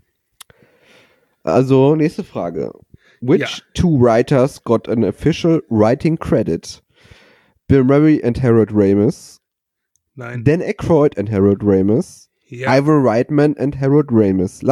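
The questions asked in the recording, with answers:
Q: Which two writers got an official writing credit?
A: Dan Aykroyd and Harold Ramis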